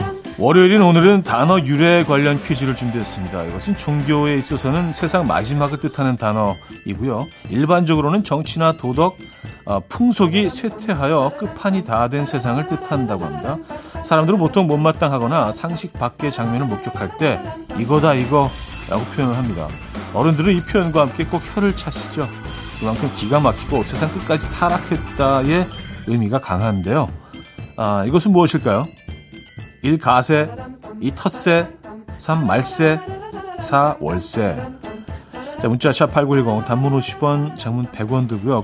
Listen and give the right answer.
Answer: 정답은 3번 말세였죠